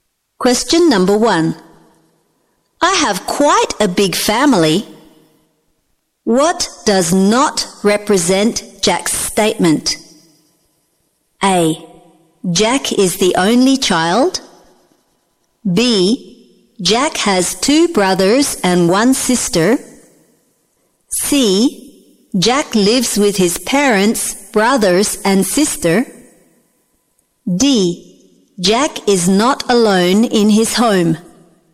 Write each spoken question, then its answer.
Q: What does not represent Jack's statement?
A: A. Jack is the only child.